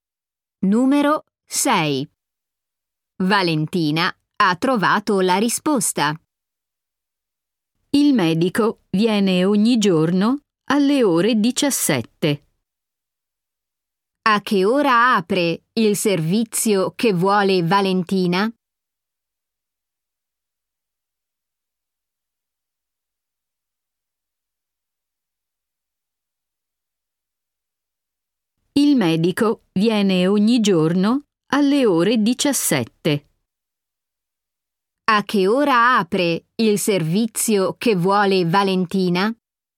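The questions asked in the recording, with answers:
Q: A che ora apre il servizio che vuole Valentina?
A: Alle 17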